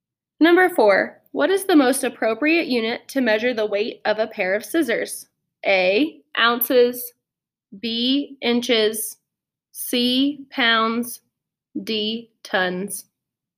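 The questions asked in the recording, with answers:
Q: what is the most appropriate unit to measure the weight of a pair of scissors?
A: A: ounces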